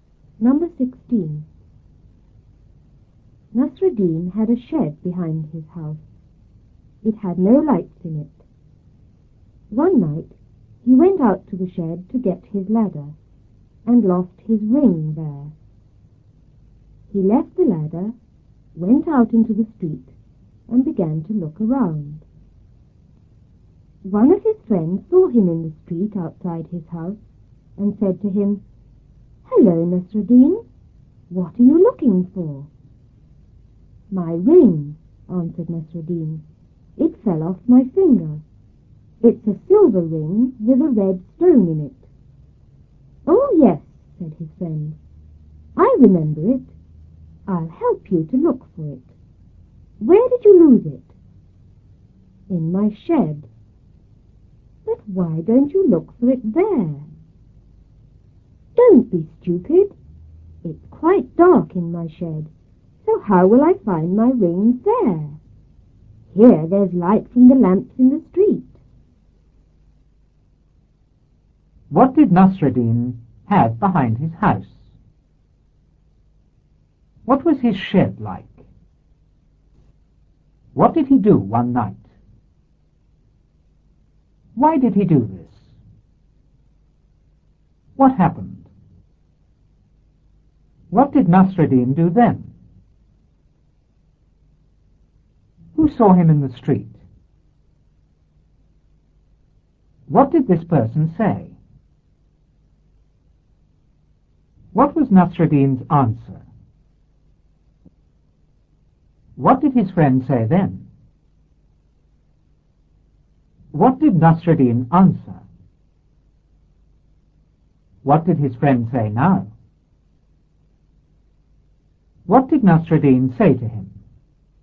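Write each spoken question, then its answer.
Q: What did Nasruddin have behind his house?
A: A shed

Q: What was his shed like?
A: It had no lights in it

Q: What did he do one night?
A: He went out to the shed

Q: Why did he do this?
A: To get his ladder

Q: What happened?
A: He lost his ring there

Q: What did Nasruddin do then?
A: He left the ladder, went out into the street and began to look around

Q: Who saw him in the street?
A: One of his friends

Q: What did this person say?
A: Hello, Nasruddin, what are you looking for?

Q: What was Nasruddin's answer?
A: My ring; it fell off my finger

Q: What did his friend say then?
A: I remember it. I'll help you look for it. Where did you lose it?

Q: What did Nasruddin answer?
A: In my shed

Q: What did his friend say now?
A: Why don't you look for it there?

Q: What did Nasruddin say to him?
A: It's dark in the shed; there's light from the street lamps here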